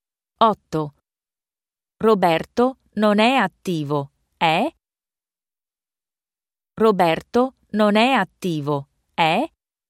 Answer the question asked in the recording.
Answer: Roberto non è attivo, è pigro.